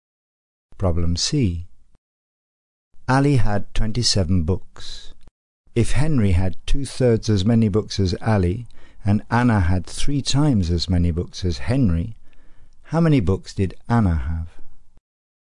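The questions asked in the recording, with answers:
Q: If Henry had 2/3 as many books as Ali, and Anna had 3 times as many books as Henry, how many books did Anna have?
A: 54 books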